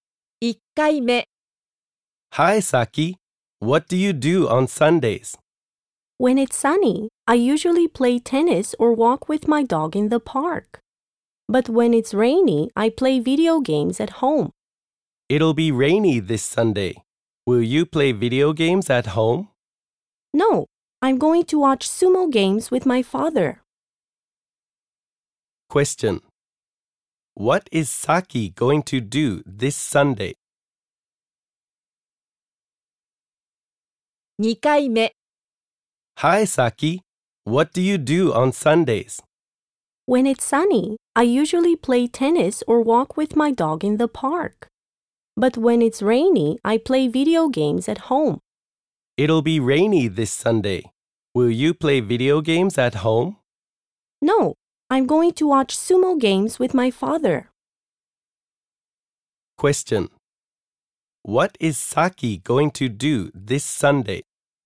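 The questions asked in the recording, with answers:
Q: What is Saki going to do this Sunday?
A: Watch sumo games with her father.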